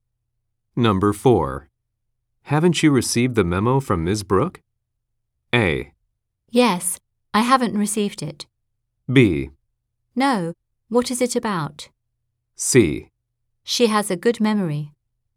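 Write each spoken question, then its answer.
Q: Haven't you received the memo from Ms.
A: B: No, what is it about?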